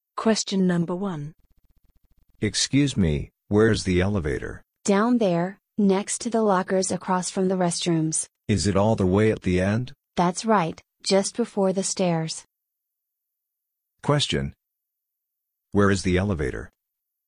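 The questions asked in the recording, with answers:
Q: Where is the elevator?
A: At the end, next to the lockers, across from the restrooms, just before the stairs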